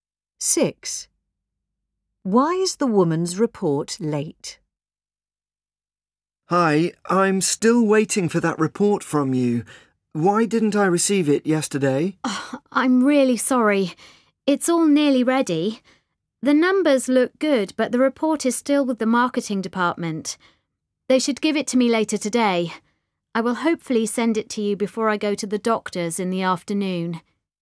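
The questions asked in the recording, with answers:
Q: Why is the woman's report late?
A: It is still with the marketing department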